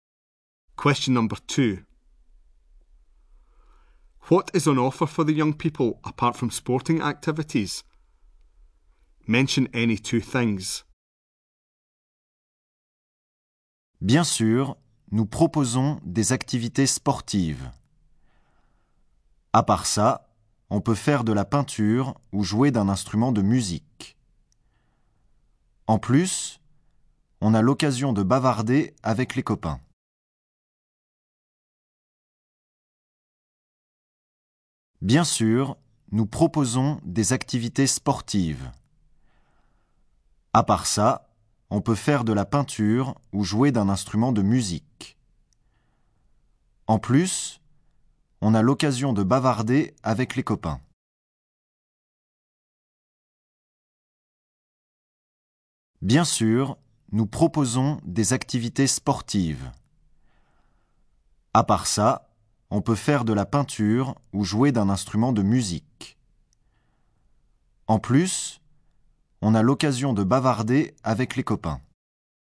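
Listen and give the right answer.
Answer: Painting, playing a musical instrument, chatting with friends (any two)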